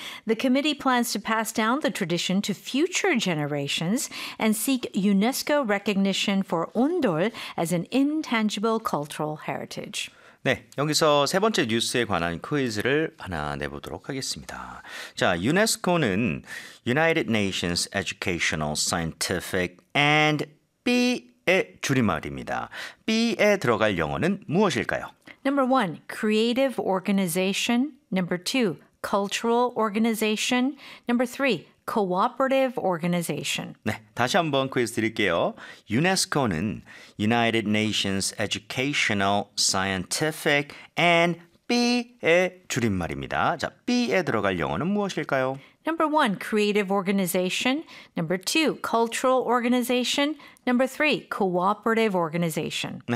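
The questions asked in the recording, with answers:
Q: B에 들어갈 영어는 무엇일까요?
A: 2: cultural organization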